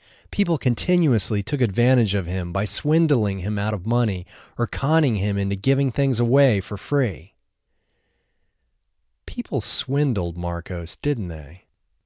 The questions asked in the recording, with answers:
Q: People swindled Marcos, didn't they?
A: Yes, people swindled Marcos.